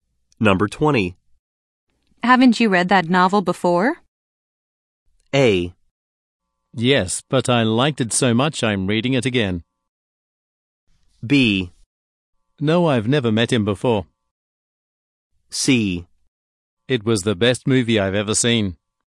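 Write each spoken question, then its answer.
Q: Haven't you read that novel before?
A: A: Yes, but I liked it so much I'm reading it again.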